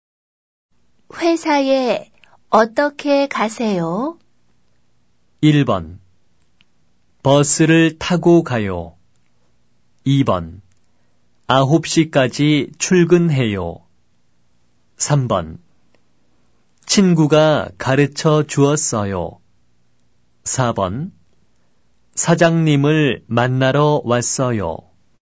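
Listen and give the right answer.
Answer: 1: 버스를 타고 가요.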